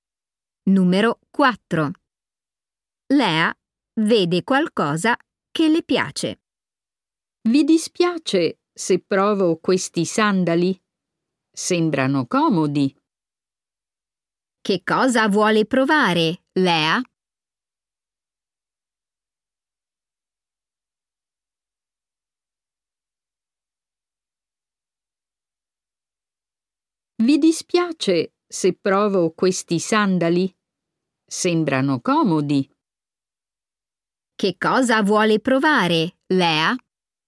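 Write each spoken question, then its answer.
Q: Che cosa vuole provare, Lea?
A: dei sandali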